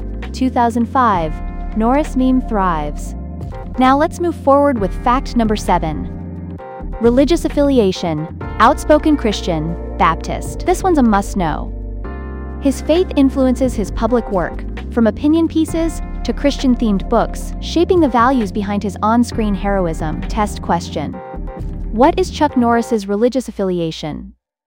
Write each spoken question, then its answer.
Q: What is Chuck Norris's religious affiliation?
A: Correct answer. Christian, Baptist.